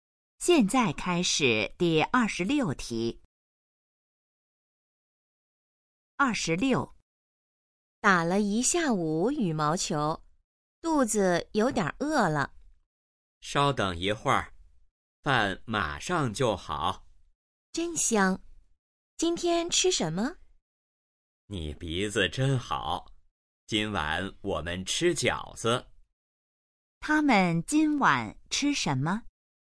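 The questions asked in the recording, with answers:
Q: 他们今晚吃什么?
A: 饺子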